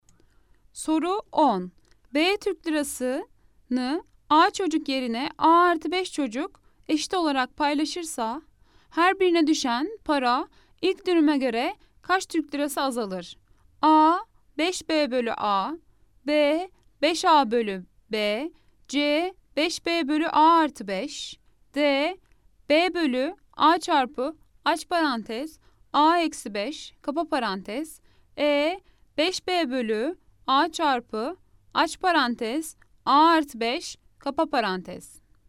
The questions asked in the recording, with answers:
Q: B Türk lirasını A çocuk yerine A artı 5 çocuk eşit olarak paylaşırsa her birine düşen para ilk dönüme göre kaç Türk lirası azalır?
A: Cevap Edirne 5B bölü A çarpı aç parantez A artı 5 kapa parantez.